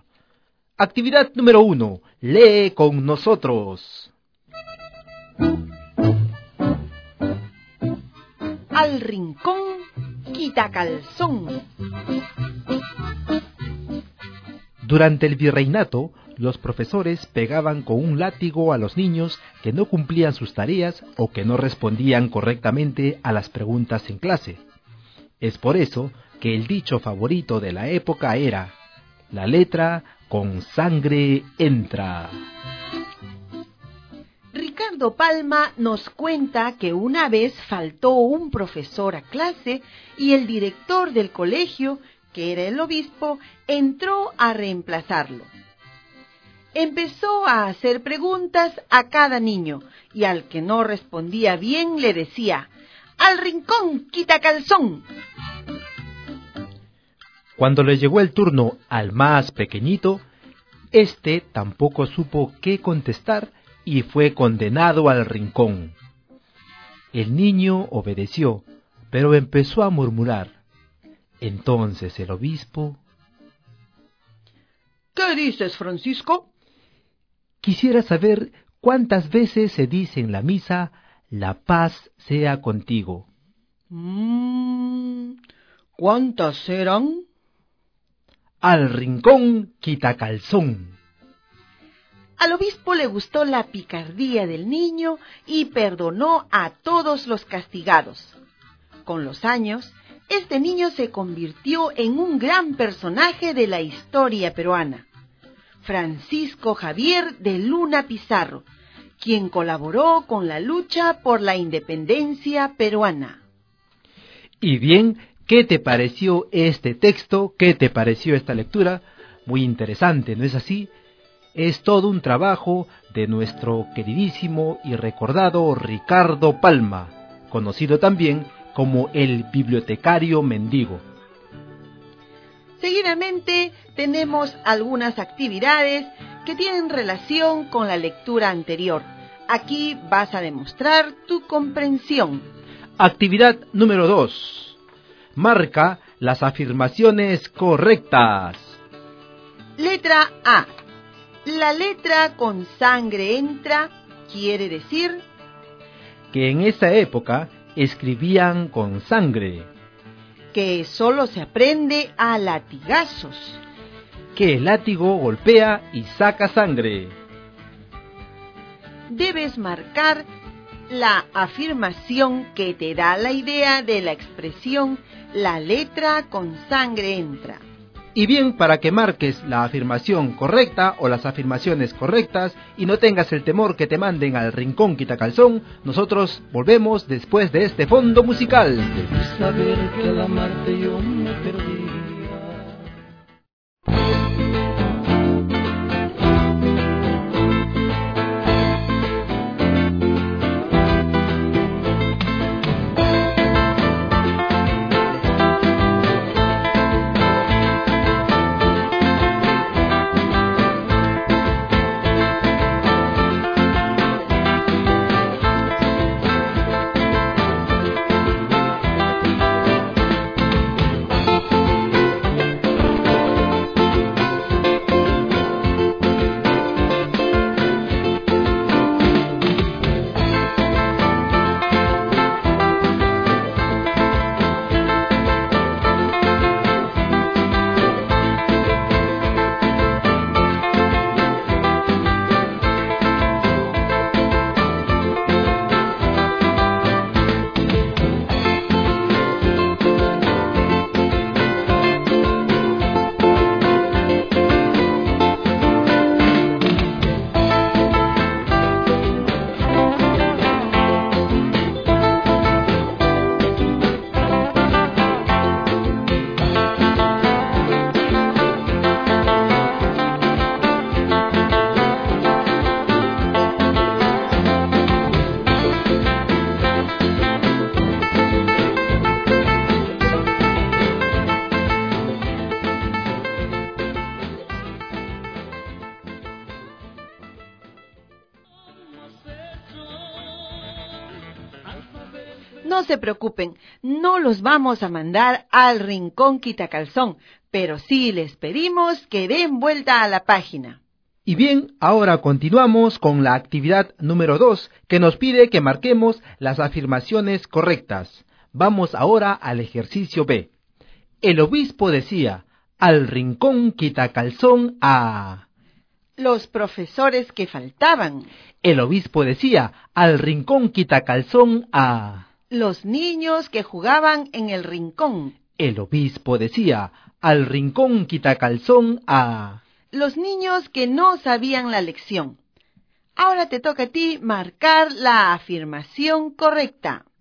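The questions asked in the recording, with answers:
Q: La letra con sangre entra quiere decir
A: que solo se aprende a latigazos

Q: El obispo decía, al rincón quitacalzón a...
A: Los niños que no sabían la lección.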